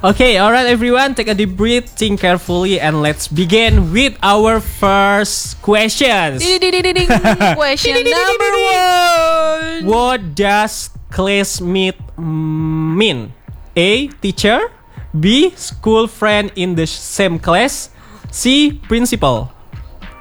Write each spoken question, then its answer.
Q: What does classmate mean?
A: That's right. Classmate is the school friend in the same class.